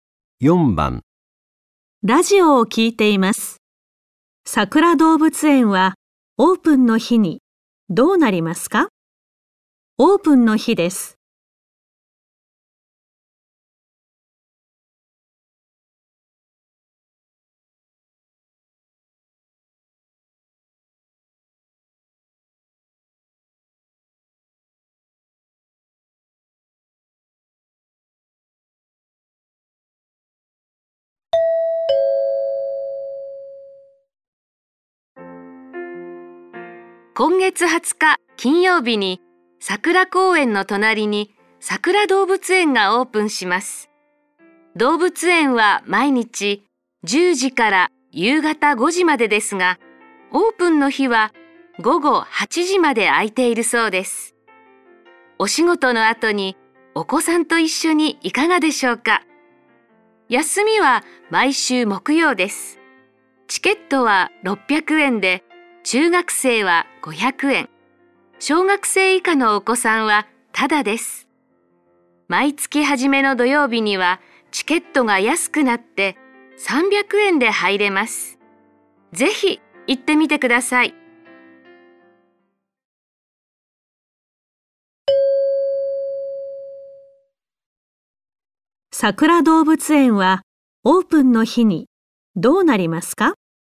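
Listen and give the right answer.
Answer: 午後8時まで開いている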